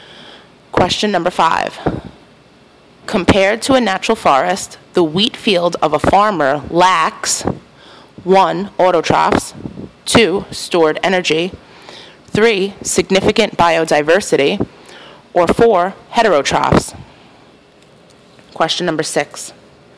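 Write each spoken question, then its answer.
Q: Compared to a natural forest, the wheat field of a farmer lacks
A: 3: Significant biodiversity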